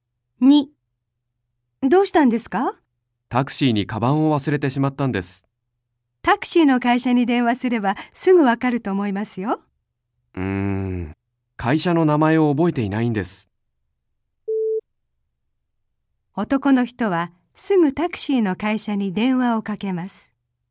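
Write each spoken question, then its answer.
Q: 男の人はすぐタクシーの会社に電話をかけます。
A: ×(正しくない)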